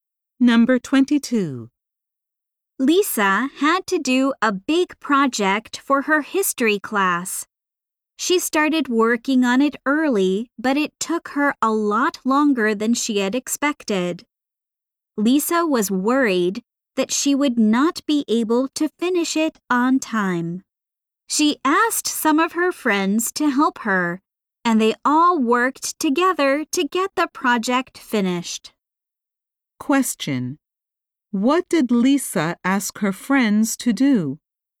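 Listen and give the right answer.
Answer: Help her finish her history project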